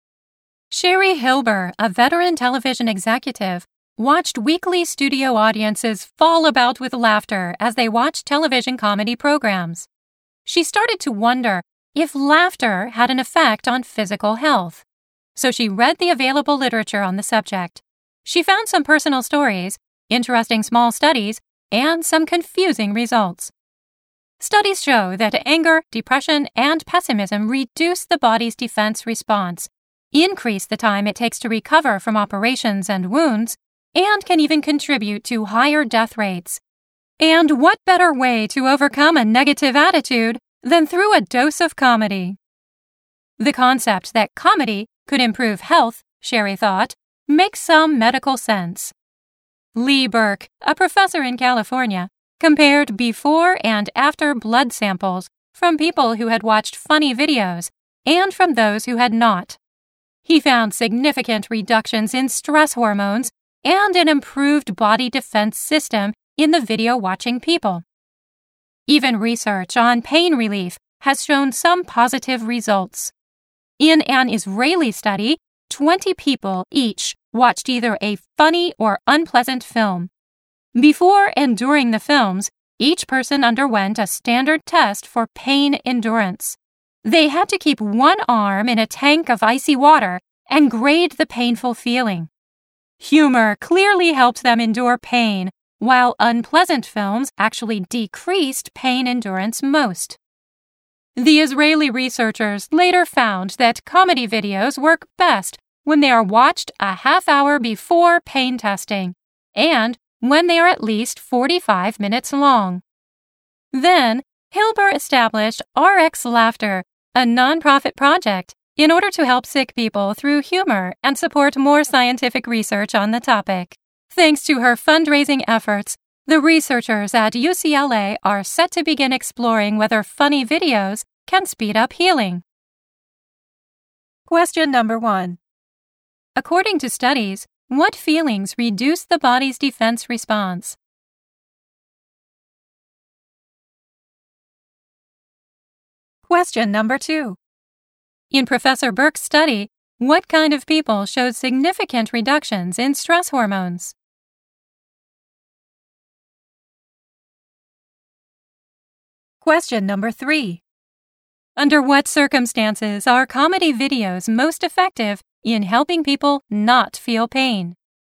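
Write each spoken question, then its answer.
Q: According to studies, what feelings reduce the body's defense response?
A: Anger, depression, and pessimism

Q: In Professor Burke's study, what kind of people showed significant reductions in stress hormones?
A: People who had watched funny videos

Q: Under what circumstances are comedy videos most effective in helping people not feel pain?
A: When watched a half hour before pain testing and at least 45 minutes long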